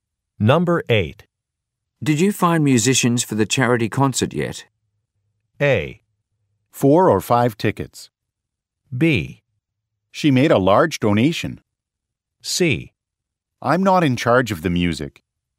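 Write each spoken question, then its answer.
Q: Did you find musicians for the charity concert yet?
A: C: I'm not in charge of the music.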